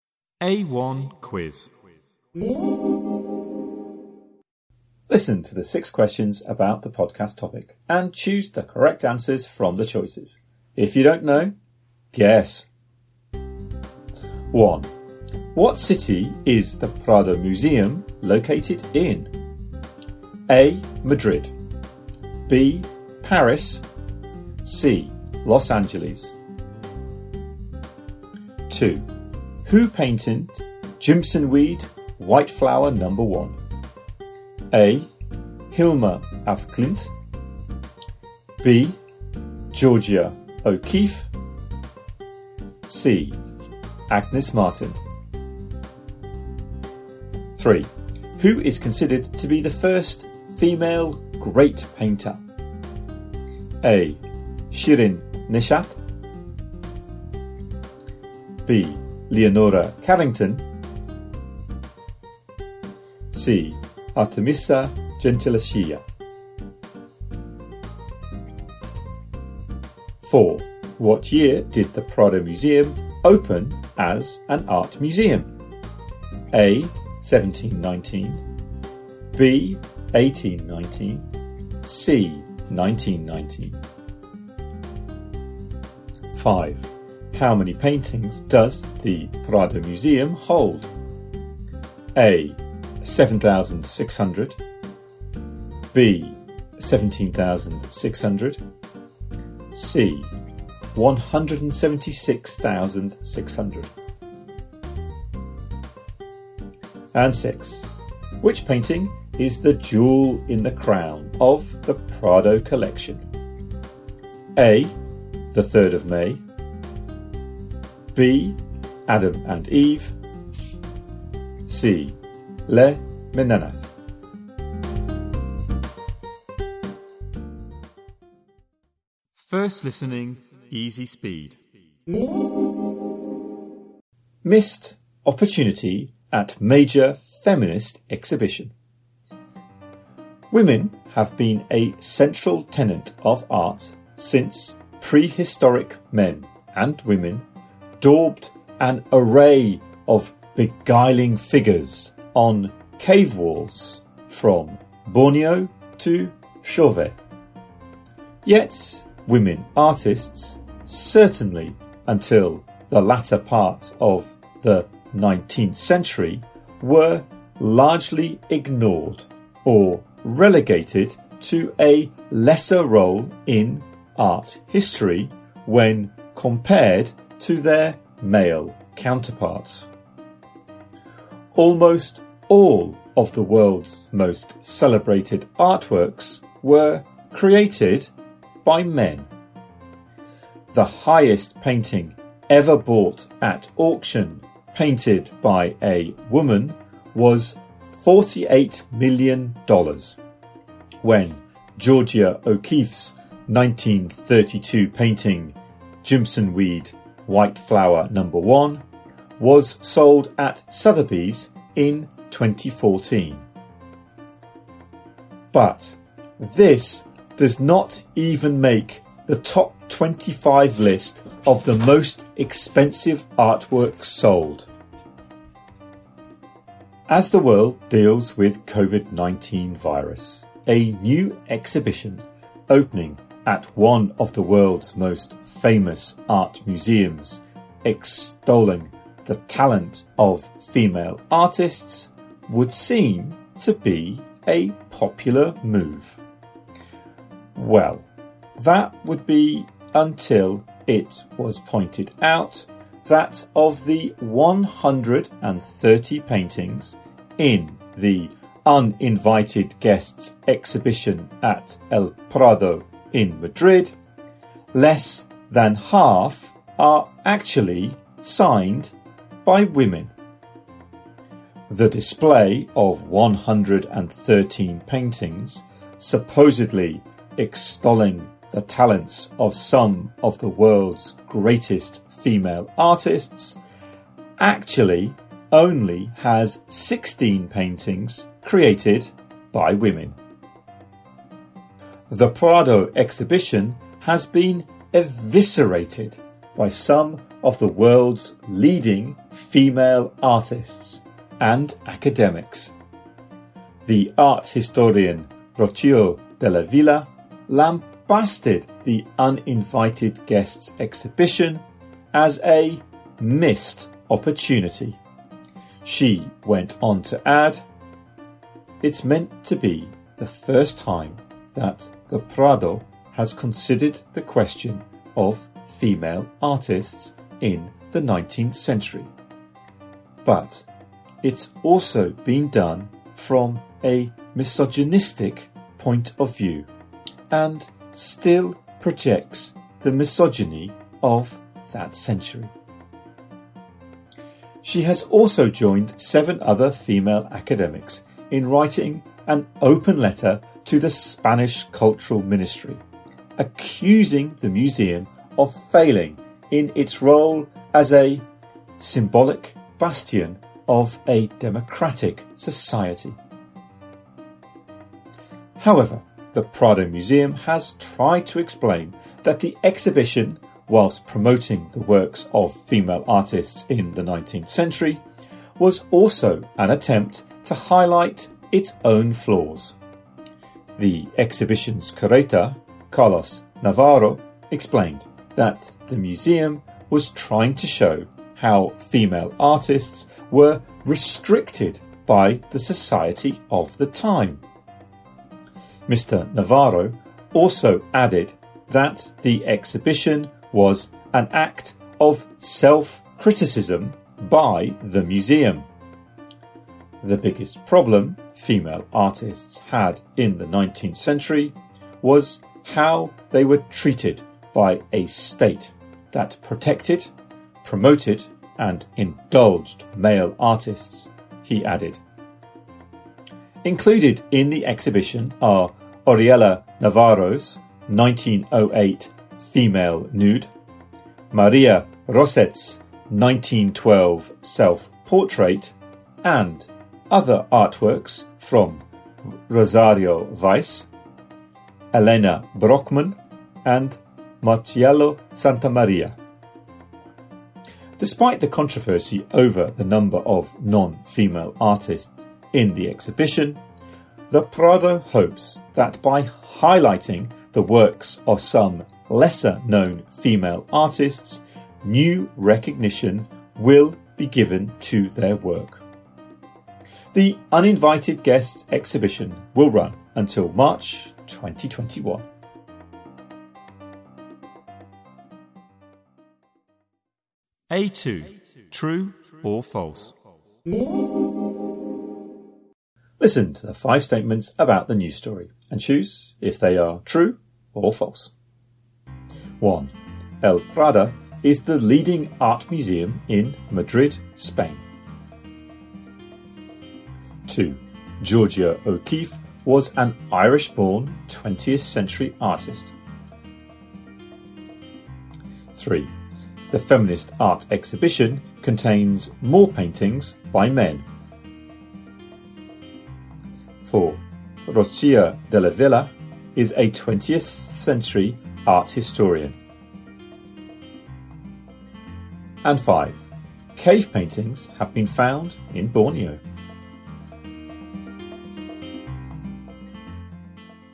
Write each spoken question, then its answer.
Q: What city is the Prado Museum located in?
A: 1A.

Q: The feminist art exhibition contains more paintings by men.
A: 3. True.

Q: Cave paintings have been found in Borneo.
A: 5. True.